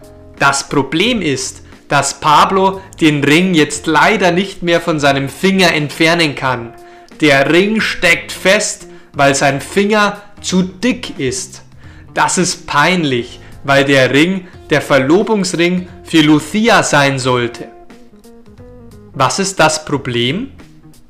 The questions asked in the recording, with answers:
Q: Was ist das Problem?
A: Das Problem ist, dass Pablo den Ring jetzt leider nicht mehr von seinem Finger entfernen kann.